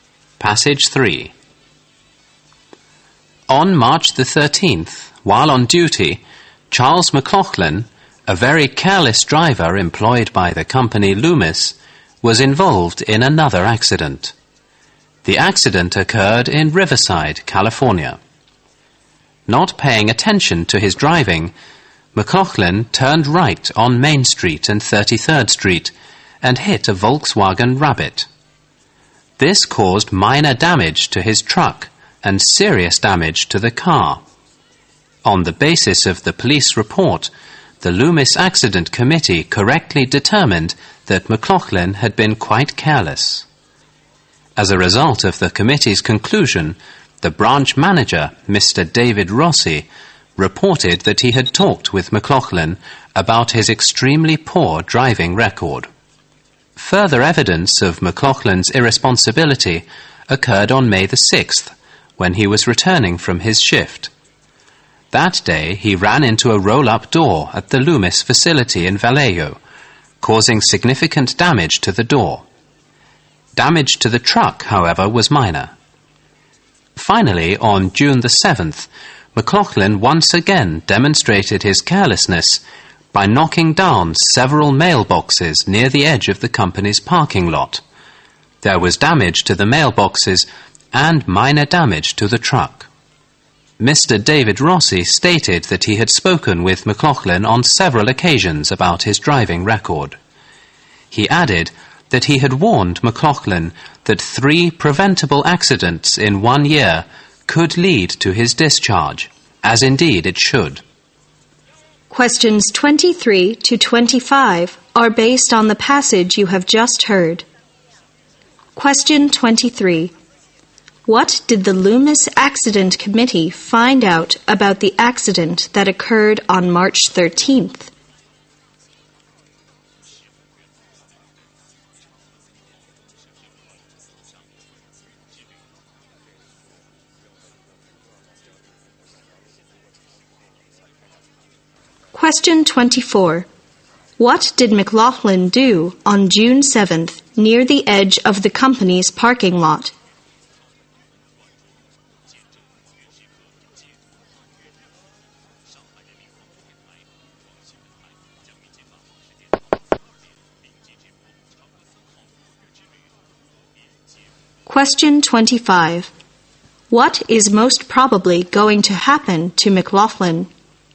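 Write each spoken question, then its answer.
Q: What did the Loomis Accident Committee find out about the accident that occurred on March 13th?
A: McLaughlin had been careless

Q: What did McLaughlin do on June 7th near the edge of the company's parking lot?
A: He knocked down several mailboxes

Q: What is most probably going to happen to McLaughlin?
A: He will be fired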